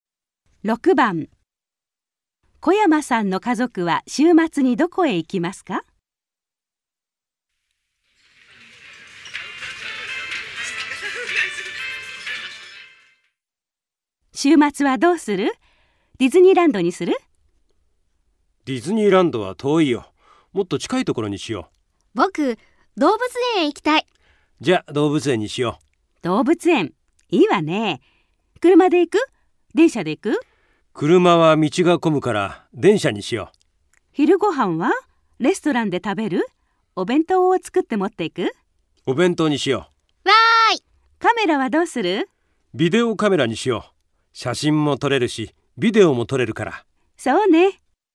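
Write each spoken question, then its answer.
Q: 小山さんの家族は週末にどこへ行きますか?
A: 動物園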